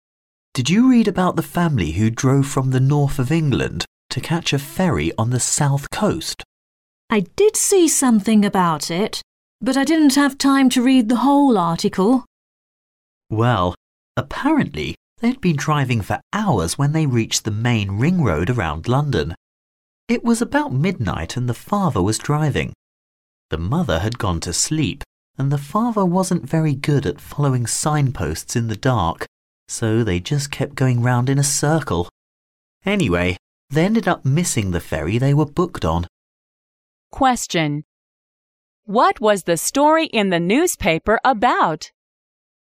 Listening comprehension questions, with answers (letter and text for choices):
What was the story in the newspaper about?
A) A car which had an accident getting onto a ferry.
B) A driver who fell asleep at the wheel.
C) A man who lost his way driving to a ferry.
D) A car ran over a man on the road.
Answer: C) A man who lost his way driving to a ferry.

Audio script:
M: Did you read about the family who drove from the north of England to catch a ferry on the south coast?
W: I did see something about it, but I didn't have time to read the whole article.
M: Well, apparently, they'd been driving for hours when they reached the main ring road around London. It was about midnight and the father was driving. The mother had gone to sleep and the father wasn't very good at following signposts in the dark, so they just kept going round in a circle!
【解析】 男士说"The father wasn't very good at following signposts in the dark, so they just kept going round in a circle!"可知他迷路了。